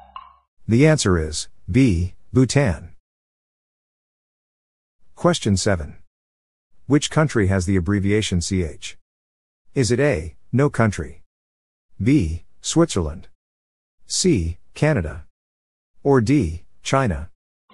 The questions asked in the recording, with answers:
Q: Which country has the abbreviation CH?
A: The answer is B, Switzerland.